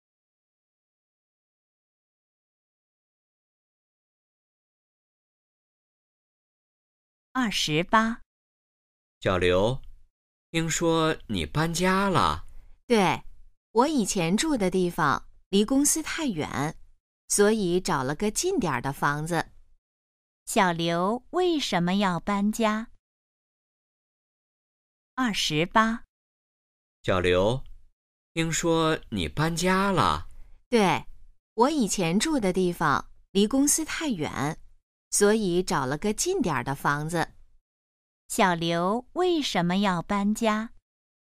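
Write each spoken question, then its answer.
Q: 小刘为什么要搬家?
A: 以前住的地方离公司太远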